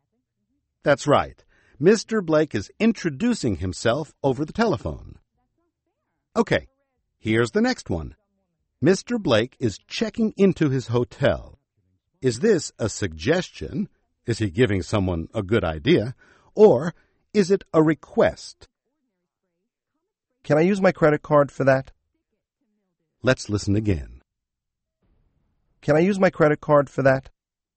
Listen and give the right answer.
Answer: That's a request. He's making a request.